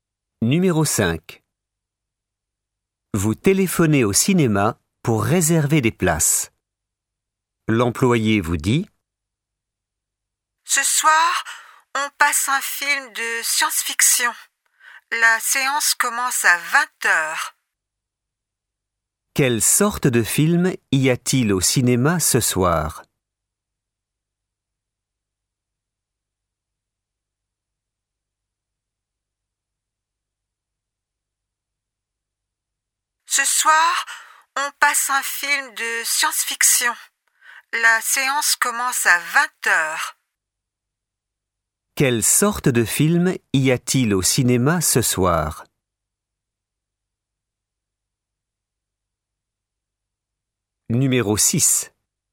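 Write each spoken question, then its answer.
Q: Quelle sorte de film y a-t-il au cinéma ce soir?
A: Un film de science-fiction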